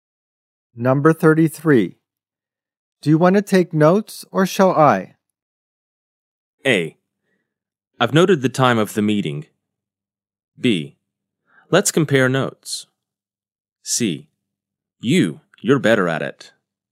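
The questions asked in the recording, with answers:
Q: Do you want to take notes or shall I?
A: C: You're better at it.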